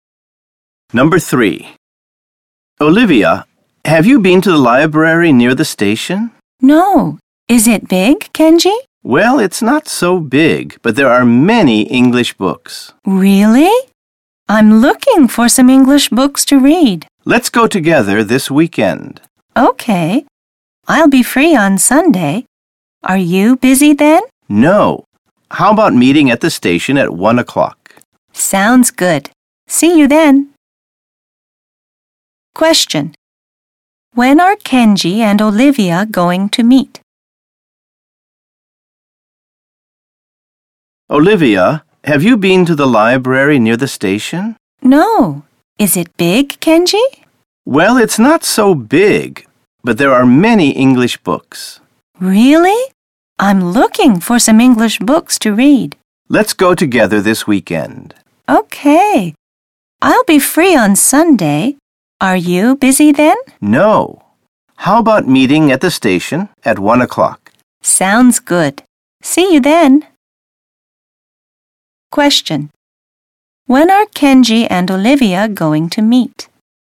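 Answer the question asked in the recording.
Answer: On Sunday at 1 o'clock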